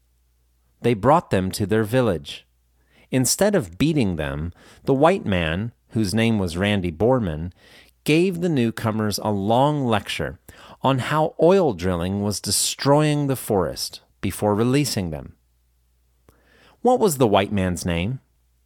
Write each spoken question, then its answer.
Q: What was the white man's name?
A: The white man's name was Randy Borman.